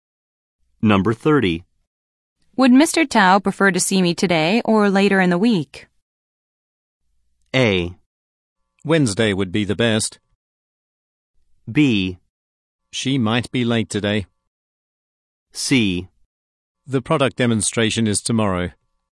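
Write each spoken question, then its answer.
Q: Would Mr. Tao prefer to see me today or later in the week?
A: A: Wednesday would be the best.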